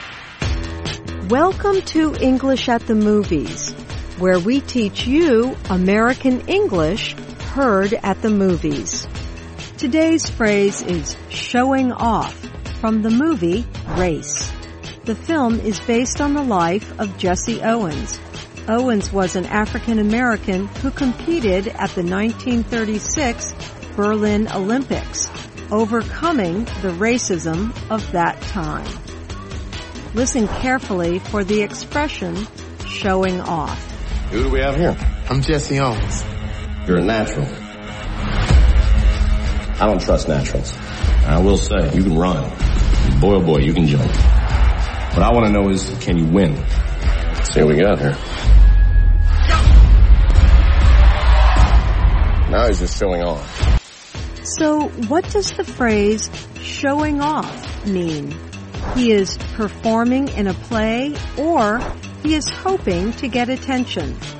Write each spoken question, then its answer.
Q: So what does the phrase showing off mean?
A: Showing off means you are hoping to get attention.